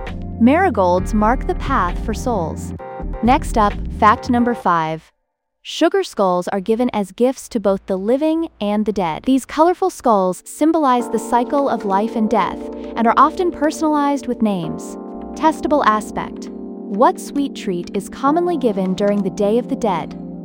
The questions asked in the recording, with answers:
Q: What sweet treat is commonly given during the Day of the Dead?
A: Correct answer, sugar skulls.